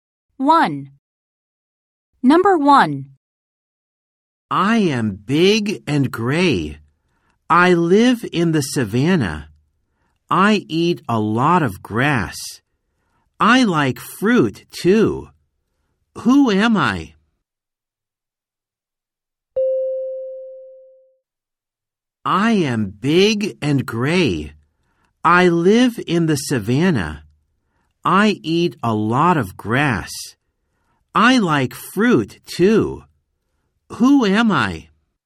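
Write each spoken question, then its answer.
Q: Who am I?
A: an elephant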